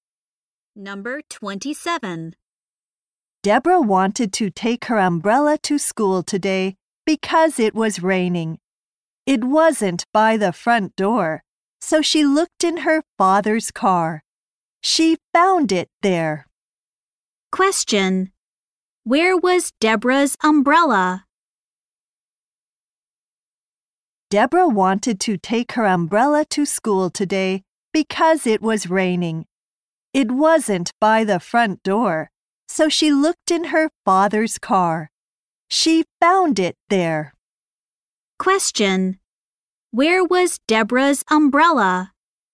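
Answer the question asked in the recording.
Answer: In her father's car.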